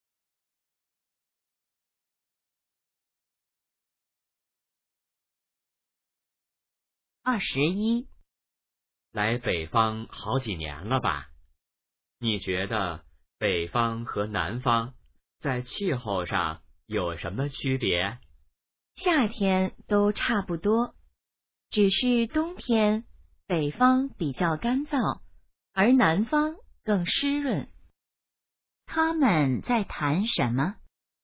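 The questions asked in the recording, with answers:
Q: 他们在谈什么?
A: 北方和南方的气候区别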